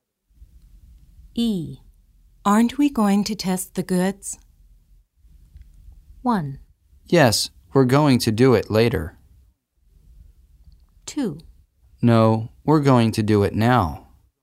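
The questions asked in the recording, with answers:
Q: Aren't we going to test the goods?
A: 1: Yes, we're going to do it later.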